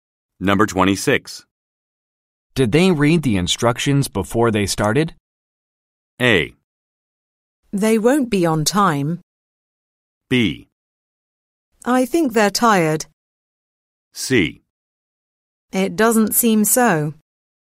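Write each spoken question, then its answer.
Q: Did they read the instructions before they started?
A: C: It doesn't seem so.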